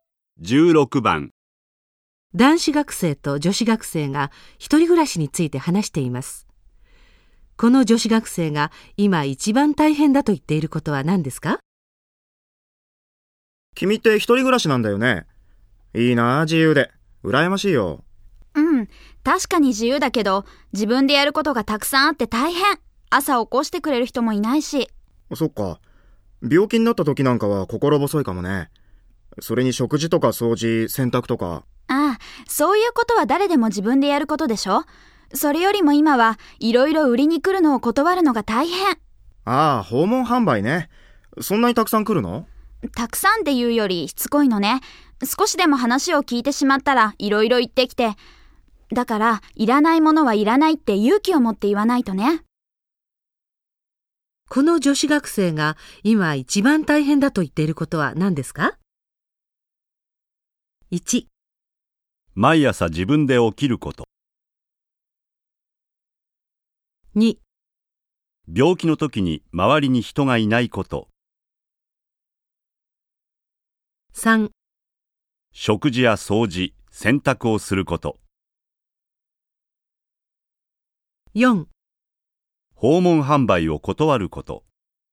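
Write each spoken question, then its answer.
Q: この女子学生が今一番大変だと言っていることは何ですか?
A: 4: 訪問販売を断ること。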